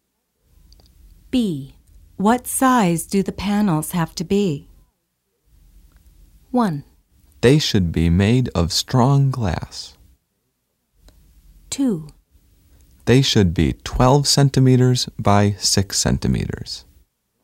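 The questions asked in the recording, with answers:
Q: What size do the panels have to be?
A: 2: They should be 12 centimeters by 6 centimeters.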